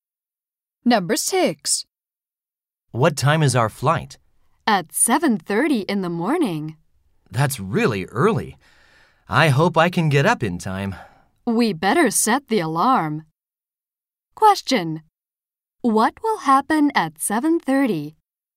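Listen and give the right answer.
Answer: Their flight will leave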